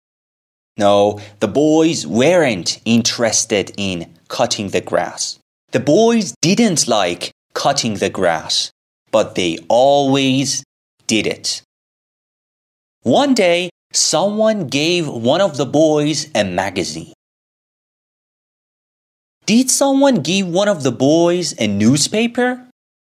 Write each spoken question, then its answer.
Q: Did someone give one of the boys a newspaper?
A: No. Someone gave one of the boys a magazine.